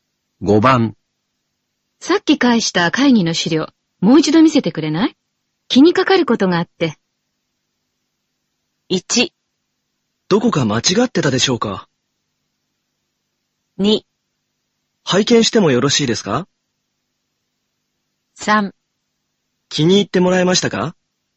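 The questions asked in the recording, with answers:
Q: さっき返した会議の資料、もう一度見せてくれない?気にかかることがあって。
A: 1: どこか間違ってたでしょうか?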